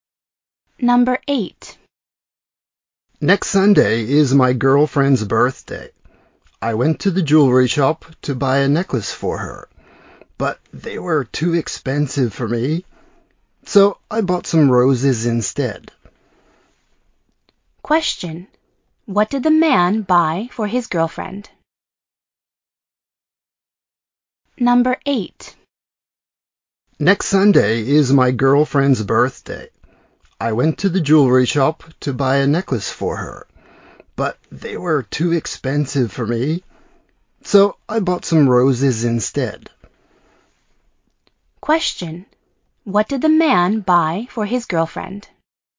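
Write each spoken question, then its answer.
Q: What did the man buy for his girlfriend?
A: Some roses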